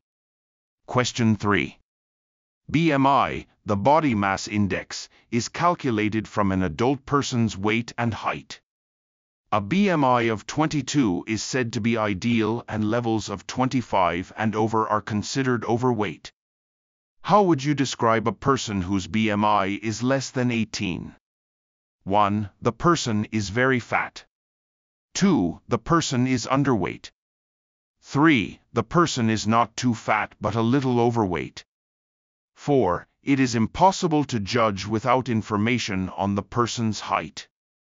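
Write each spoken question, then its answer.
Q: How would you describe a person whose BMI is less than 18?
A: 2: The person is underweight.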